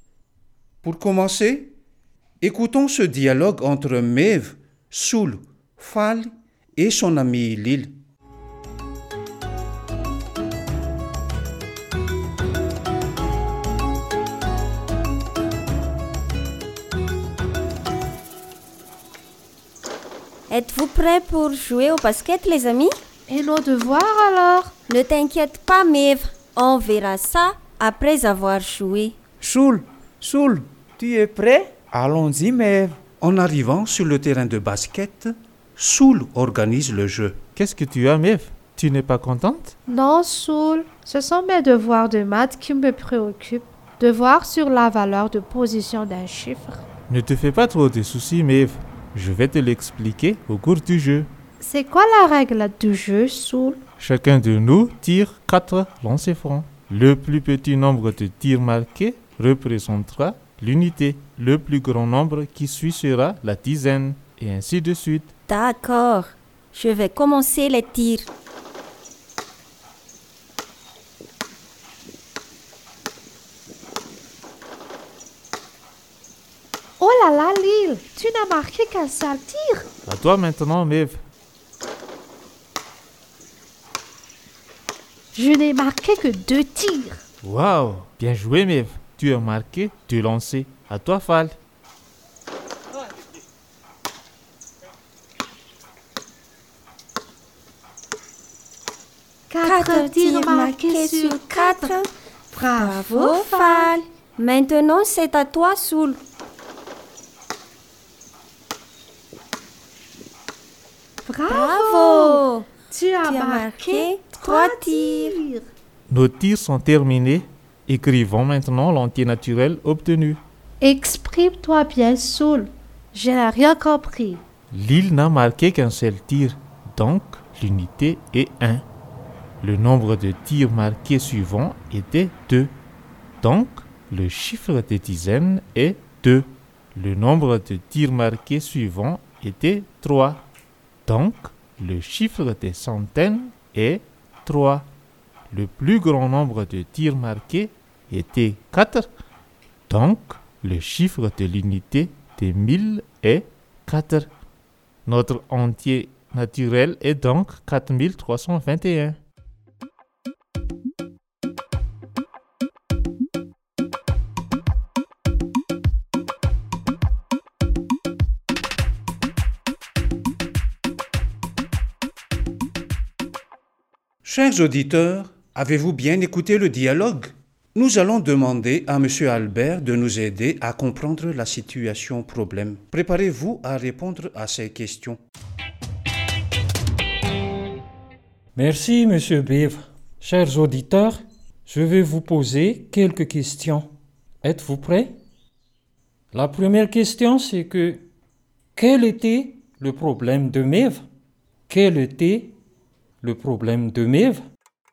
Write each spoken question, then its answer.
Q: La première question, c'est que quel était le problème de Mev?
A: le problème de Mev se pose sur les chiffres des unités, des dizaines et d'un nombre entier naturel.